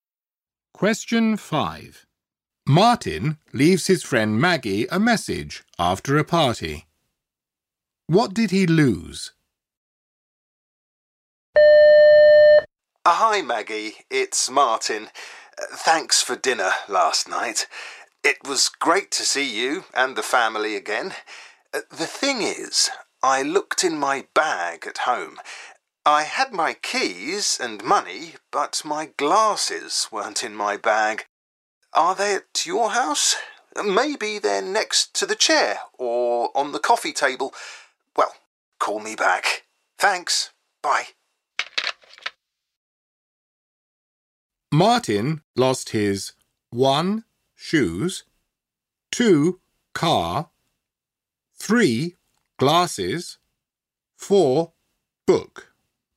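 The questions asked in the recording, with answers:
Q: What did he lose?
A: 3: Glasses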